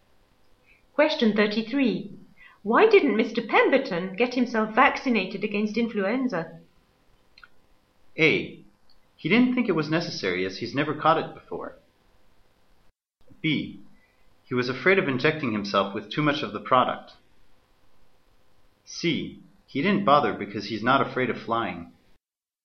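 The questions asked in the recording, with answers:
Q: Why didn't Mr. Pemberton get himself vaccinated against influenza?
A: A: He didn't think it was necessary, as he's never caught it before.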